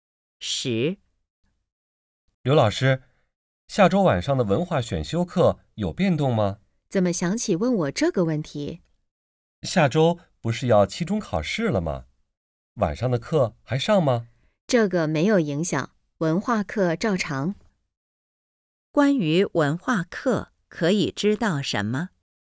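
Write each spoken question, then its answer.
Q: 关于文化课,可以知道什么?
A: 照常上课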